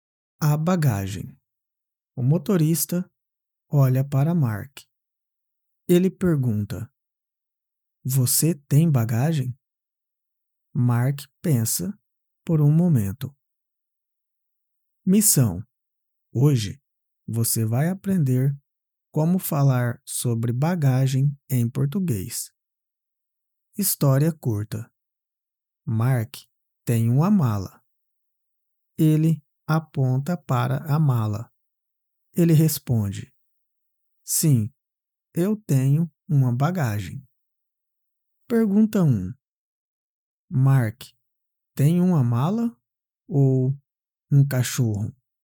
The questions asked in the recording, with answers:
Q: Mark, tem uma mala ou um cachorro?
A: Mark tem uma mala.